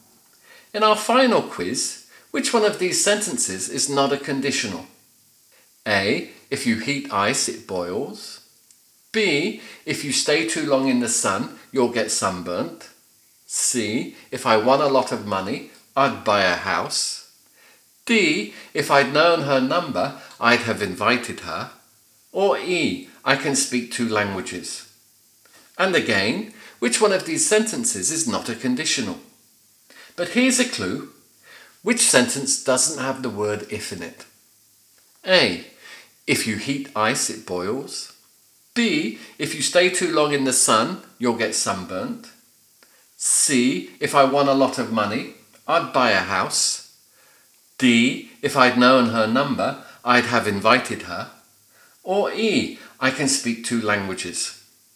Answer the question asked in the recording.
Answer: Yes, that's it, it's E, I can speak two languages, because there's no if in it.